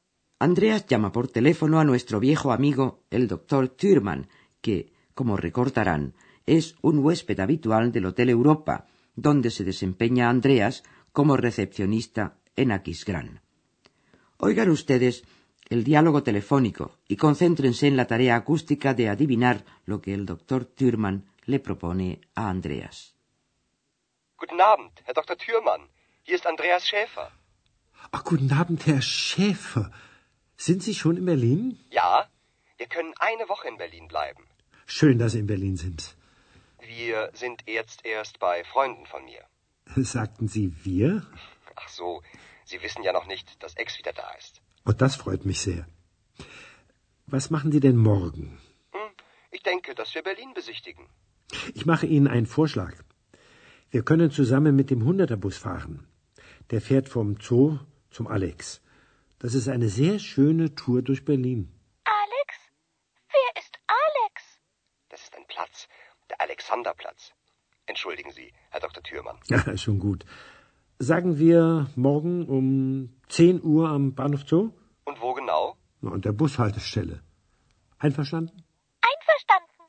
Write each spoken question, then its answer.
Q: concéntrense en la tarea acústica de adivinar lo que el doctor Thürmann le propone a Andreas.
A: La propuesta del doctor Thurman fue hacer una excursión al día siguiente por Berlín con el autobús 100.